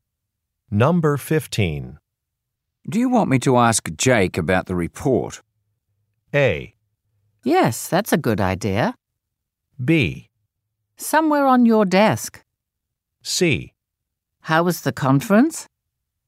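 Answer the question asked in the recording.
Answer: A: Yes, that's a good idea.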